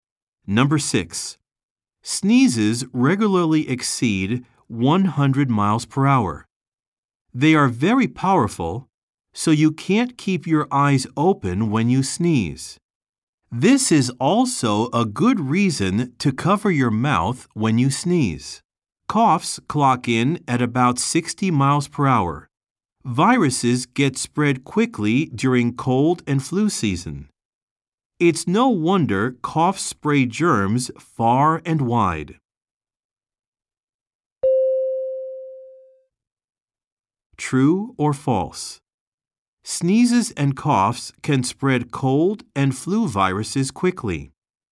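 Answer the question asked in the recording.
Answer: True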